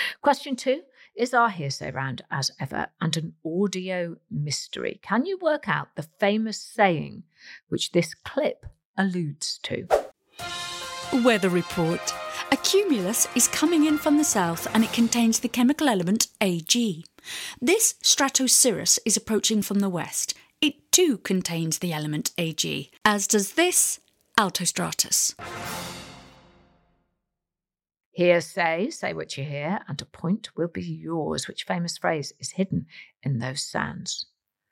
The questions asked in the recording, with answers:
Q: Which famous phrase is hidden in those sands?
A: The answer is every cloud has a silver lining.